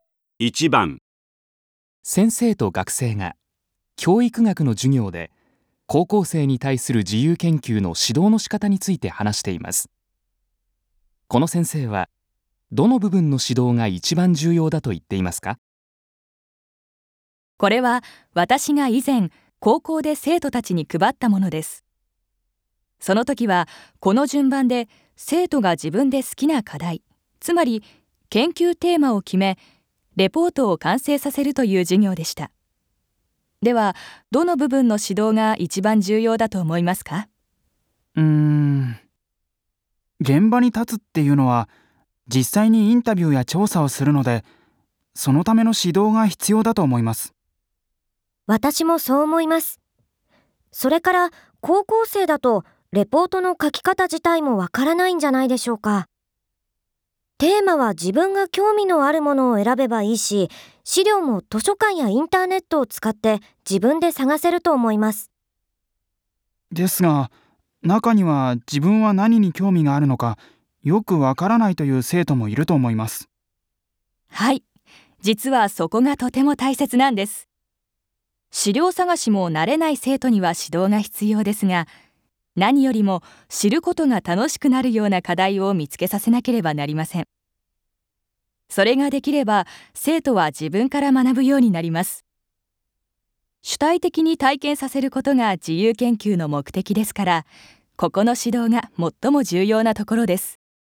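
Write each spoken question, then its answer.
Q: この先生はどの部分の指導が一番重要だと言っていますか?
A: 研究テーマ(課題)を決める部分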